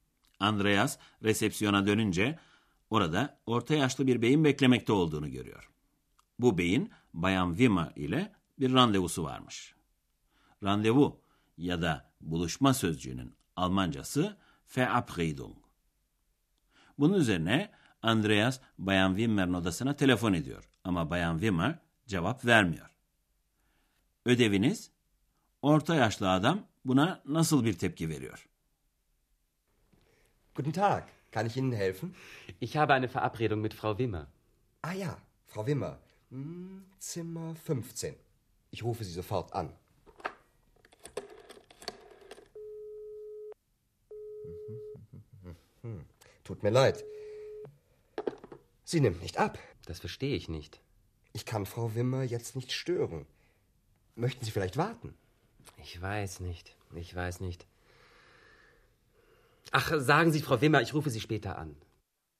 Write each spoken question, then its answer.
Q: Ödeviniz, orta yaşlı adam buna nasıl bir tepki veriyor?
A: Orta yaşlı bey daha sonra telefon edeceğim diye haber bırakıyor.